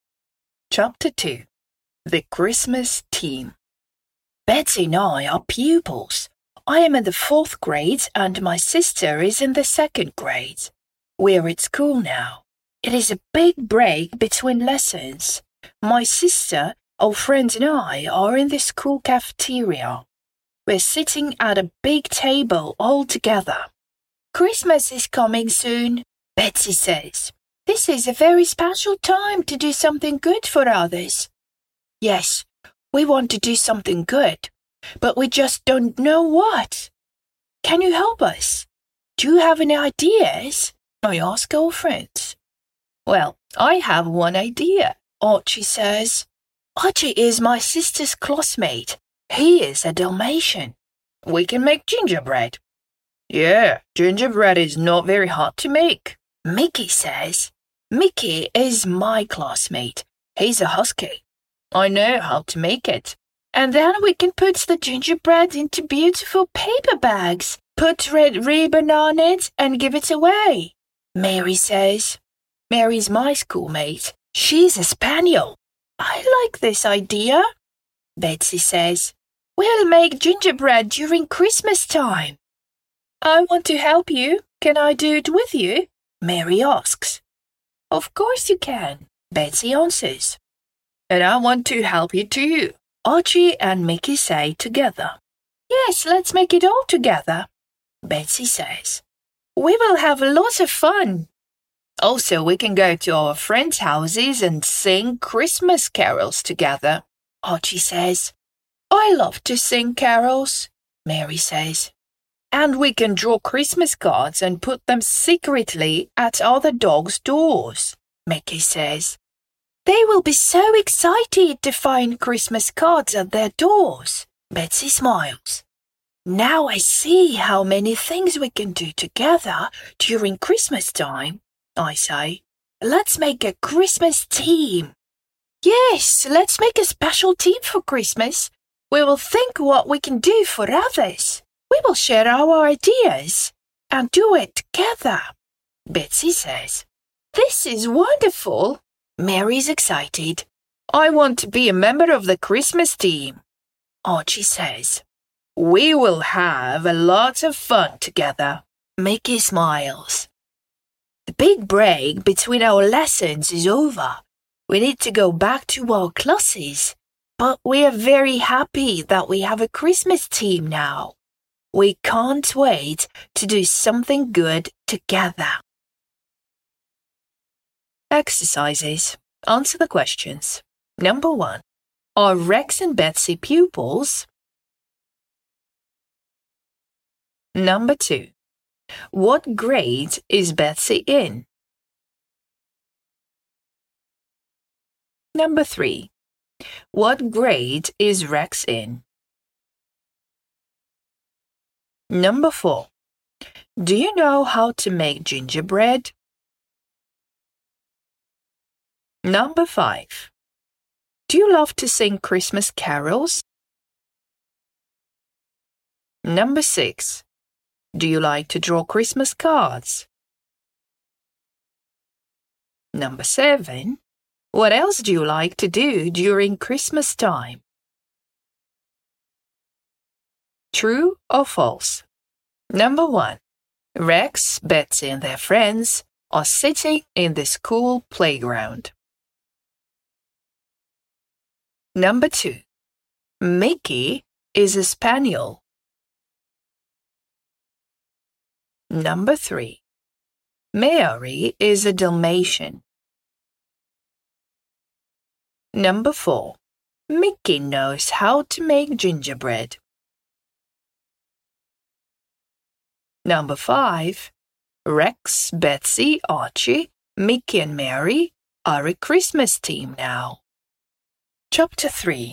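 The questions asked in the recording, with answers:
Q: Are Rex and Betsy pupils?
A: Yes

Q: What grade is Betsy in?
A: The second grade

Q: What grade is Rex in?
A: The fourth grade

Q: Rex, Betsy and their friends are sitting in the school playground.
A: False

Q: Mickey is a spaniel.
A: False

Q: Mary is a Dalmatian.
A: False

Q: Mickey knows how to make gingerbread.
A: True

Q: Rex, Betsy, Archie, Mickey and Mary are a Christmas team now.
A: True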